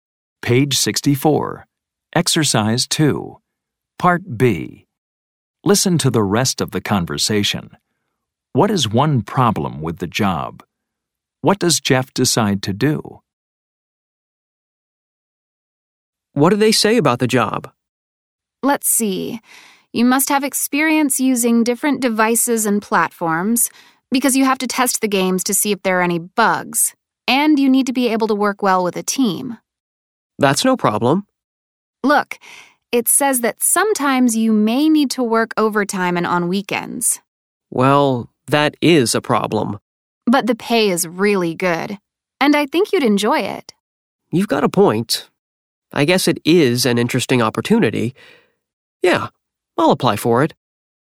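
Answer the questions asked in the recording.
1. Sometimes you may need to work overtime and on weekends.
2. He decides to apply for the job.
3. You need experience with different devices and platforms to test games for bugs, and you must work well in a team. The pay is really good.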